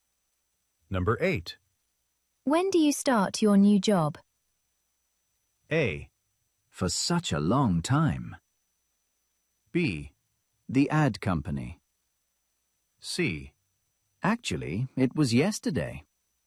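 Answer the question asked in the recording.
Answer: C: Actually, it was yesterday.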